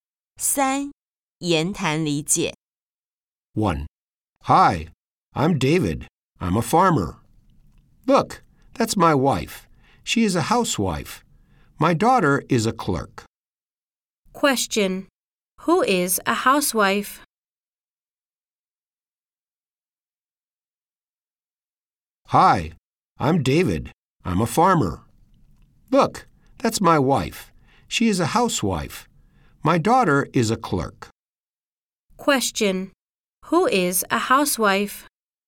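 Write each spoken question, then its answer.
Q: Who is a housewife?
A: David's wife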